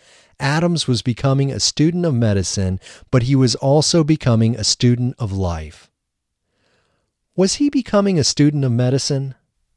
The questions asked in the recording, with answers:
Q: Was he becoming a student of medicine?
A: Yes, Adams was becoming a student of medicine.